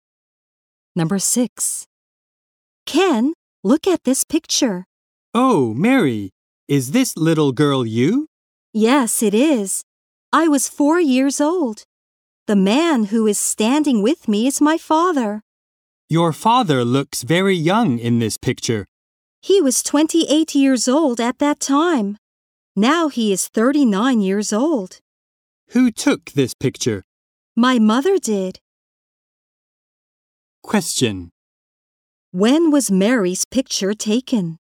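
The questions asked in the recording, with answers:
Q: When was Mary's picture taken?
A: When she was 4 years old (11 years ago)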